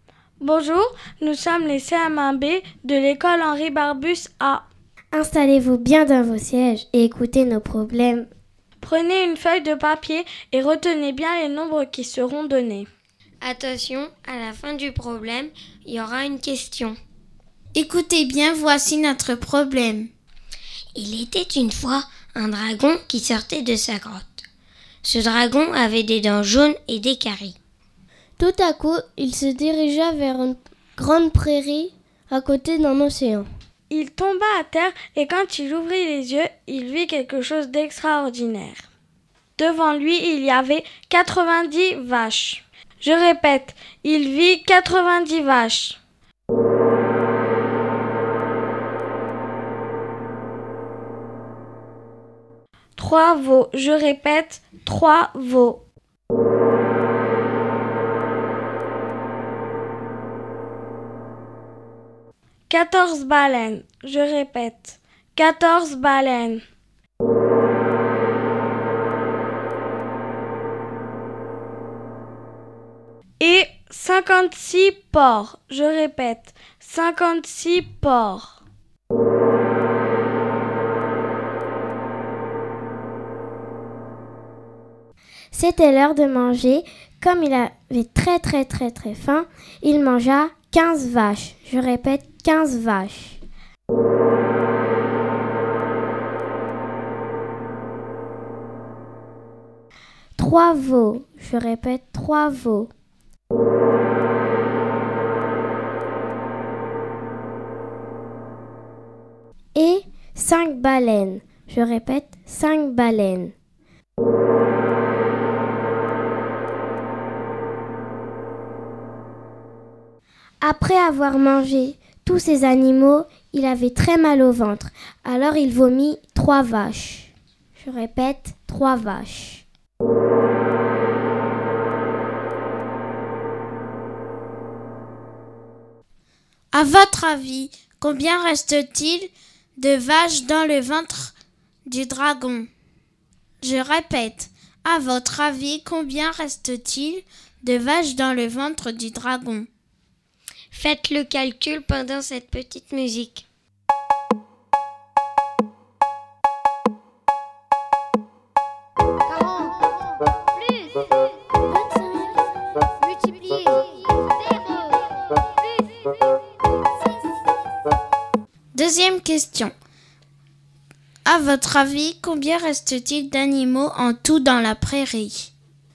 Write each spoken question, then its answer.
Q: À votre avis, combien reste-t-il de vaches dans le ventre du dragon?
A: il reste 12 vaches dans le ventre du dragon.